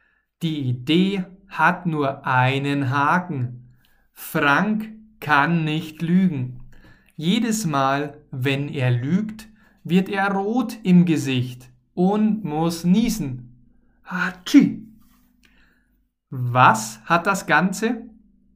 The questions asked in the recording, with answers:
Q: Was hat das Ganze?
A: Einen Haken. Das Ganze hat einen Haken.